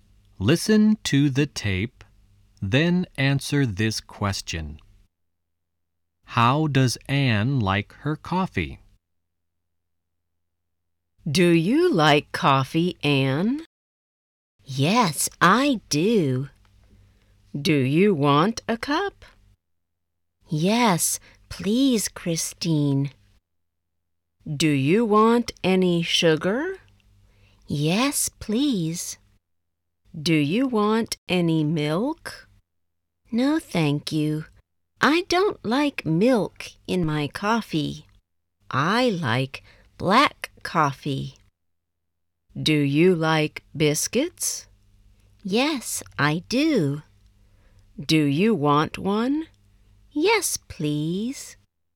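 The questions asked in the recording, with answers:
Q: How does Anne like her coffee?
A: Black, with sugar and no milk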